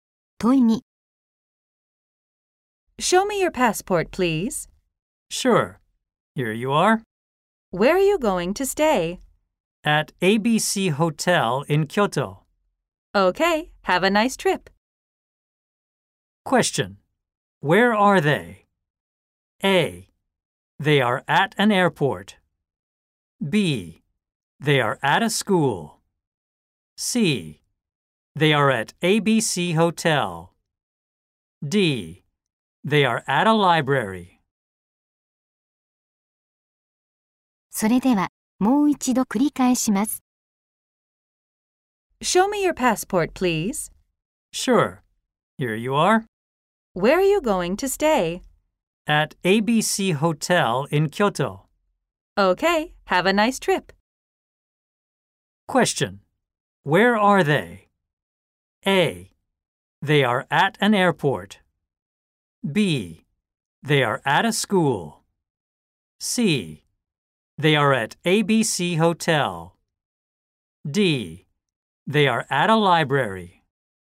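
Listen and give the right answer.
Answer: A: They are at an airport.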